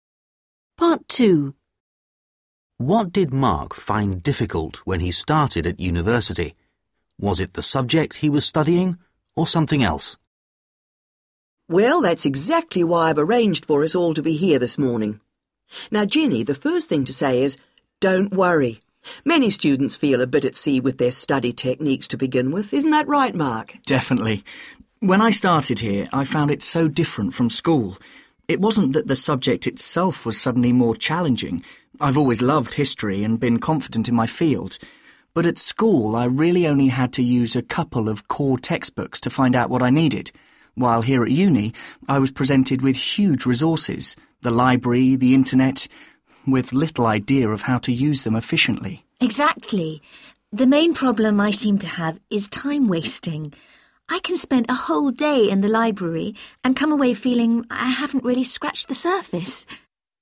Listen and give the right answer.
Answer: Mark didn't find his subject, history, any more difficult.